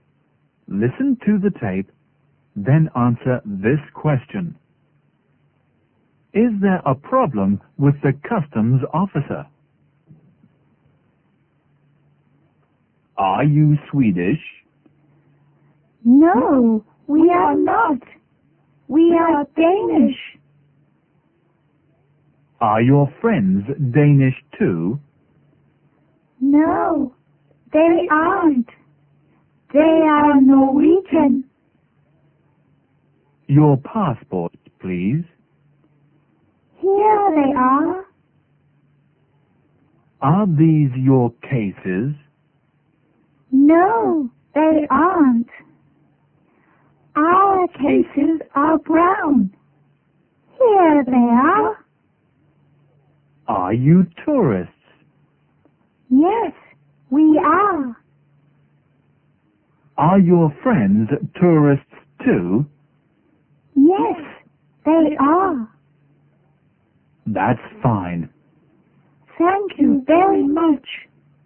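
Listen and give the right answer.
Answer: No, there isn't. Everything is fine.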